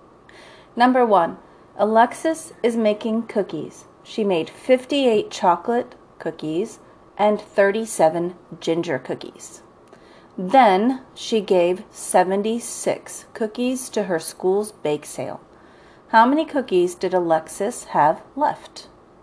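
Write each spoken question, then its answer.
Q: How many cookies did Alexis have left?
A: 19 cookies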